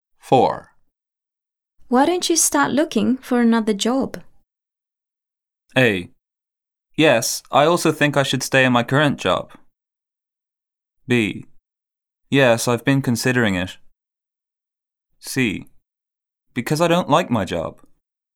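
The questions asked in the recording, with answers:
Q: Why don't you start looking for another job?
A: B: Yes, I've been considering it.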